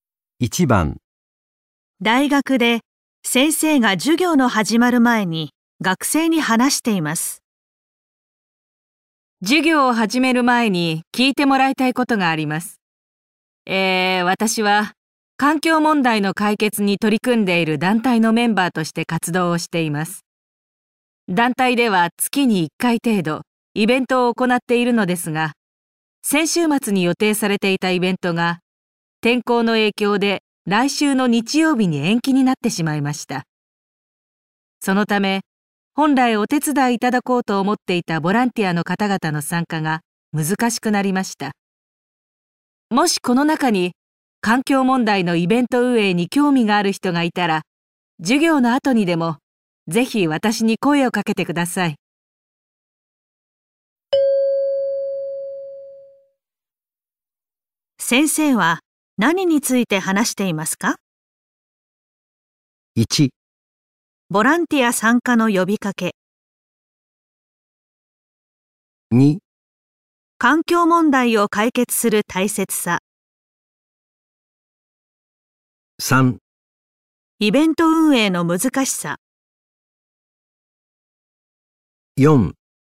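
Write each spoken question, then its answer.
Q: 先生は何について話していますか?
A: 1: ボランティア参加の呼びかけ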